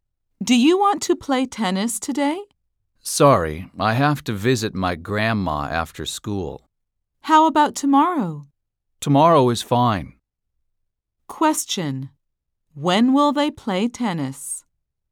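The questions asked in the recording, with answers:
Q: When will they play tennis?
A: tomorrow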